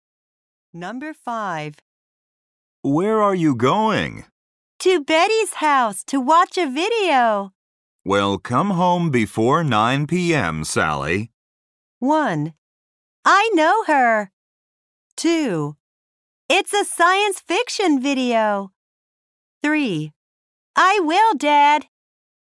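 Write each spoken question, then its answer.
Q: Well, come home before 9 p.m., Sally.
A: 3: I will, Dad.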